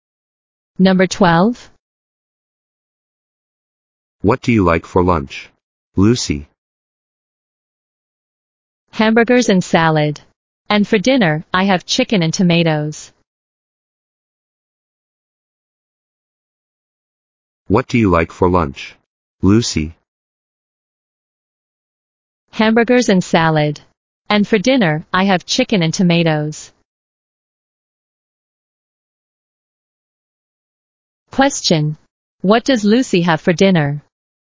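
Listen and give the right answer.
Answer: Chicken and tomatoes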